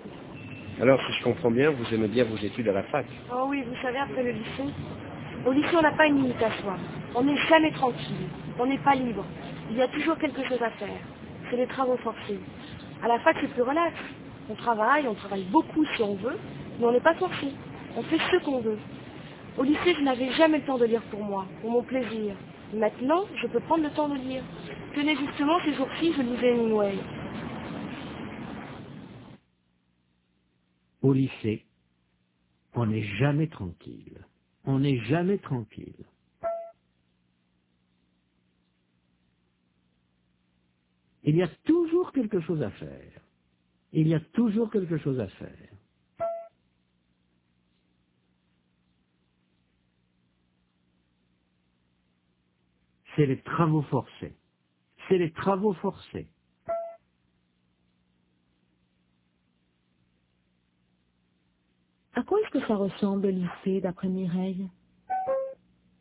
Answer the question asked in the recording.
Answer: Aux travaux forcés.